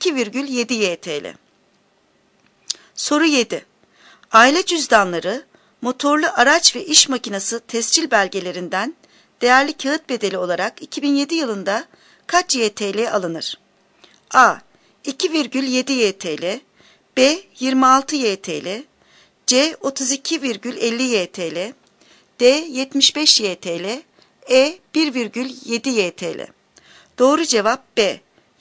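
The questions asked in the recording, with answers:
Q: Aile cüzdanları, motorlu araç ve iş makinesi tescil belgelerinden değerli kağıt bedeli olarak 2007 yılında kaç YTL alınır?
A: B: 26 YTL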